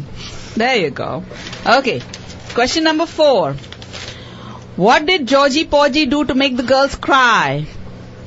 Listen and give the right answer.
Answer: Georgie Porgie kissed the girls and made them cry.